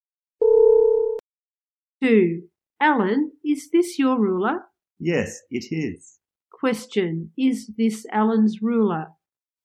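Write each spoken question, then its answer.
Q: Is this Alan's ruler?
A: Yes, it is.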